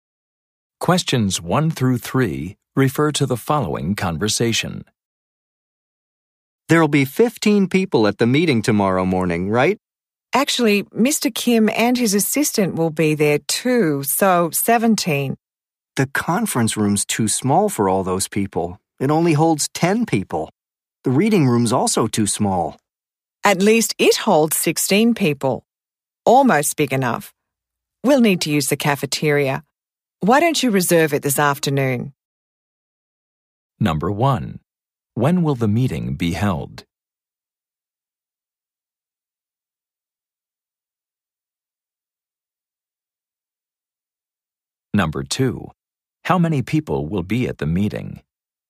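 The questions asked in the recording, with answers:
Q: When will the meeting be held?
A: Tomorrow morning

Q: How many people will be at the meeting?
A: 17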